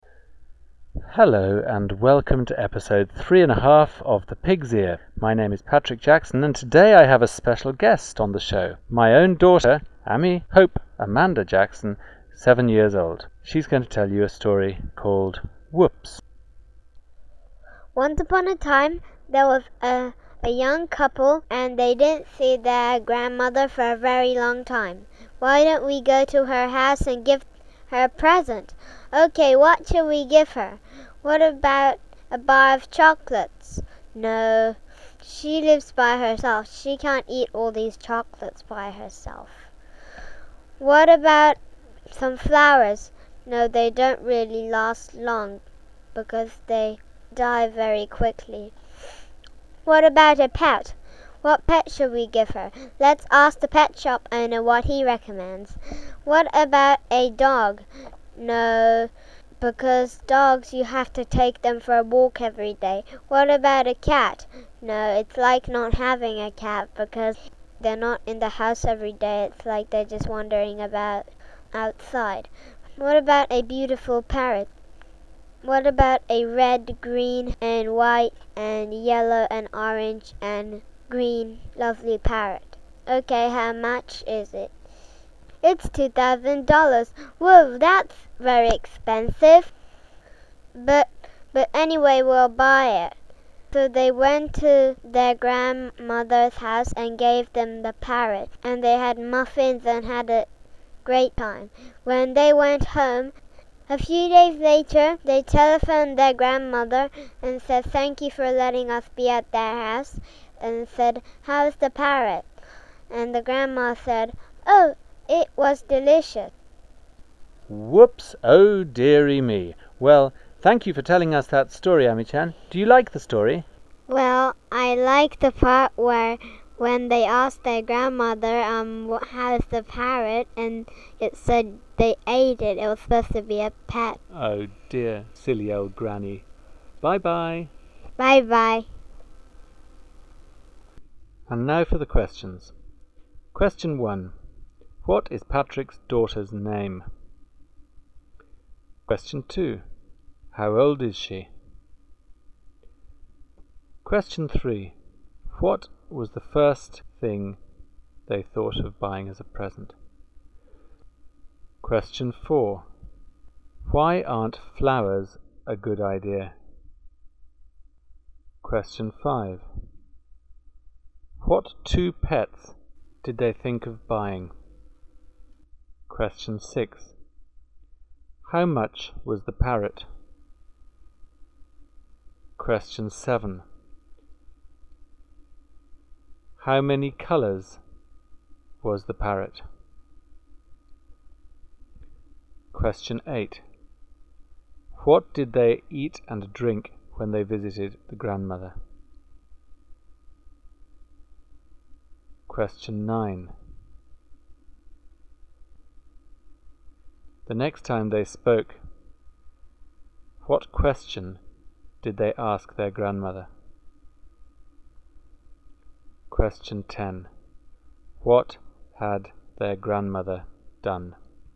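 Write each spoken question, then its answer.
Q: What is Patrick's daughter's name?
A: Ami Hope Amanda Jackson

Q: How old is she?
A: 7 years old

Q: What was the first thing they thought of buying as a present?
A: A bar of chocolates

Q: Why aren't flowers a good idea?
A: They don't last long; they die very quickly

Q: How much was the parrot?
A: $2,000

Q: The next time they spoke, what question did they ask their grandmother?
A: How's the parrot?

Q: What had their grandmother done?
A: She ate the parrot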